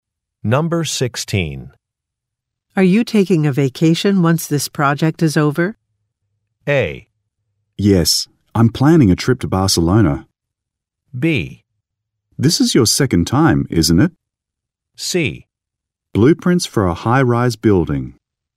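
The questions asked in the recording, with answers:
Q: Are you taking a vacation once this project is over?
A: A: Yes, I'm planning a trip to Barcelona.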